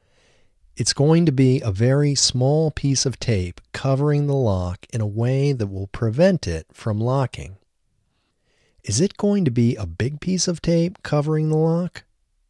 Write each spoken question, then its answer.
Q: Is it going to be a big piece of tape covering the lock?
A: No, it isn't going to be a big piece of tape covering the lock.